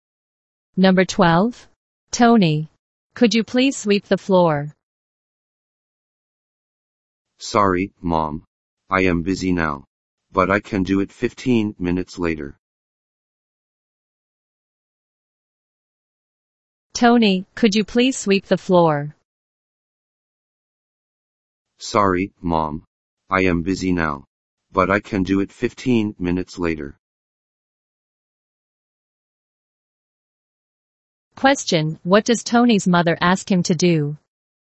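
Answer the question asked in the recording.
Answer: Sweep the floor.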